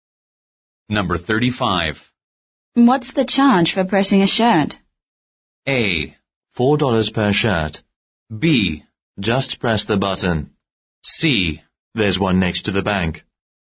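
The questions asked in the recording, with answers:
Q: What's the charge for pressing a shirt?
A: A: $4 per shirt.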